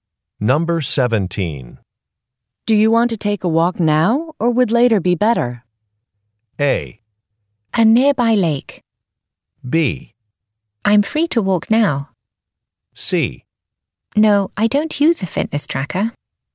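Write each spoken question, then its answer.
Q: Do you want to take a walk now or would later be better?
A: B: I'm free to walk now.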